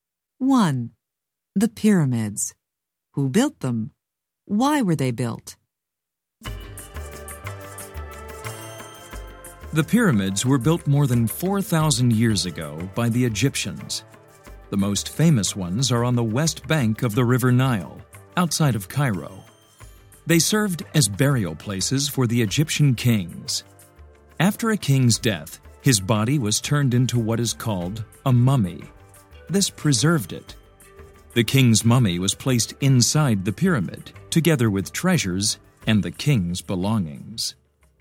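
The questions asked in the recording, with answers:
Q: The pyramids. Who built them?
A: The Egyptians

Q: Why were they built?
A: As burial places for the Egyptian kings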